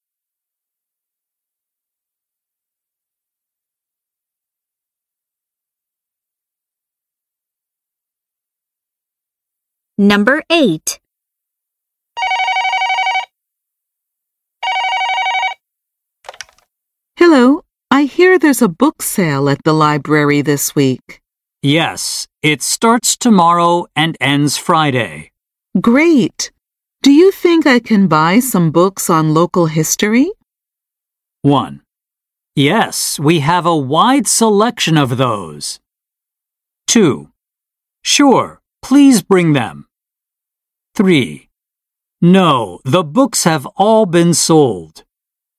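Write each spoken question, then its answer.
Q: Great. Do you think I can buy some books on local history?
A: 1: Yes, we have a wide selection of those.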